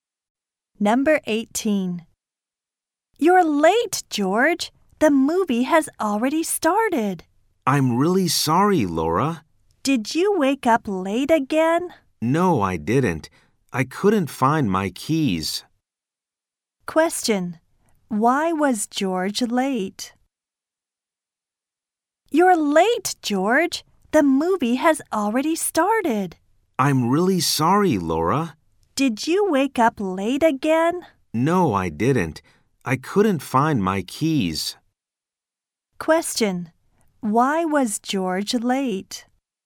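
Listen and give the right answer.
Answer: He couldn't find his keys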